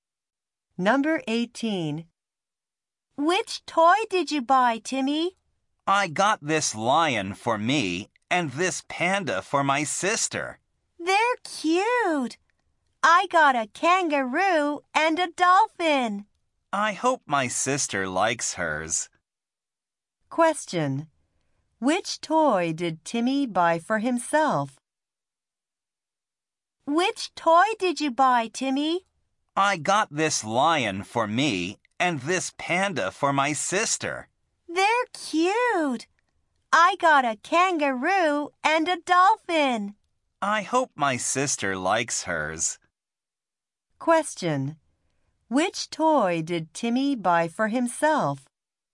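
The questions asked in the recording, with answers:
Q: Which toy did Timmy buy for himself?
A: The lion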